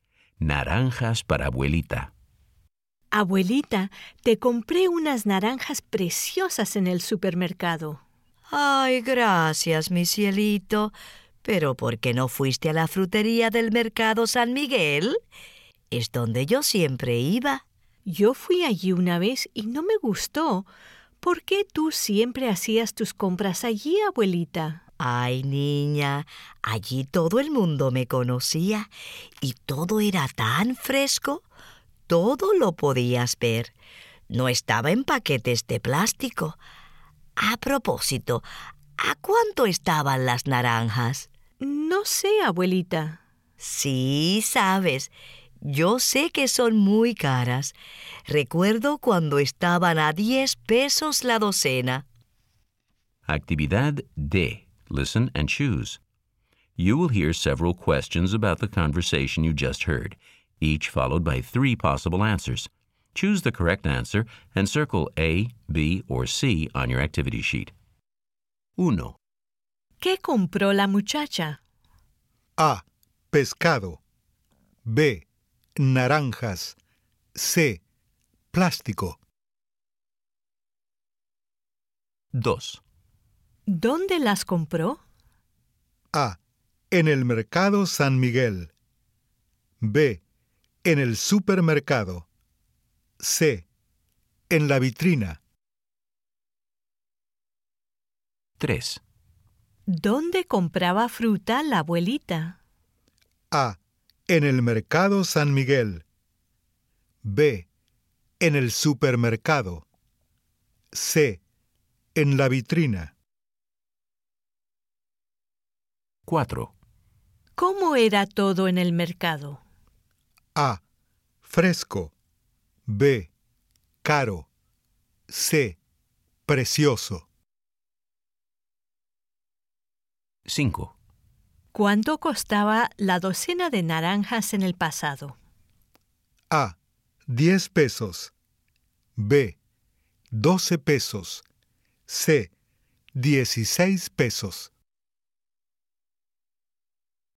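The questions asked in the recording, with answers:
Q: ¿Qué compró la muchacha?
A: B: Naranjas

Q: ¿Dónde las compró?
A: B: En el supermercado

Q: ¿Dónde compraba fruta la abuelita?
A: A: En el Mercado San Miguel

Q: ¿Cómo era todo en el mercado?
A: A: Fresco

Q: ¿Cuánto costaba la docena de naranjas en el pasado?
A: A: 10 pesos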